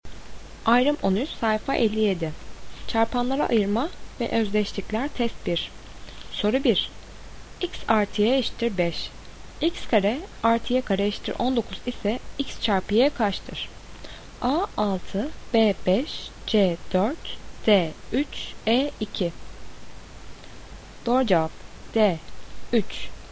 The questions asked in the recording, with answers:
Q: X kare artı y kare eşittir 19 ise x çarpı y kaçtır?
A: Doğru cevap D 3.